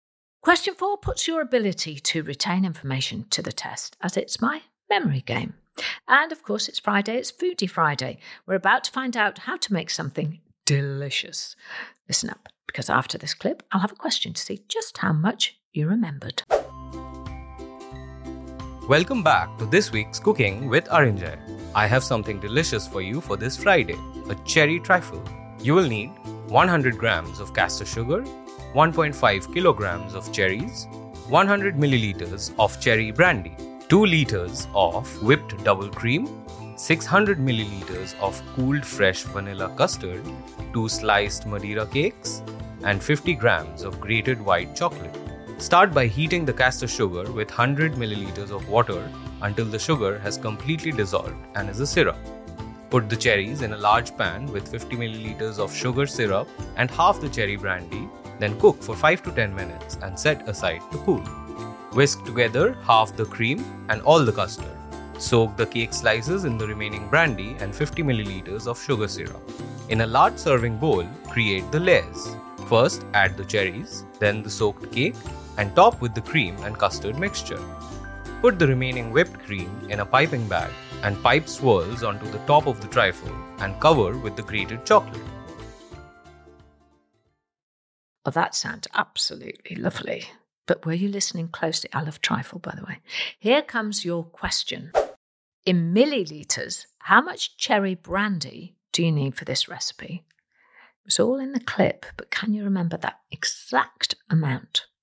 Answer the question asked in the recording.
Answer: And the answer was 100 millilitres.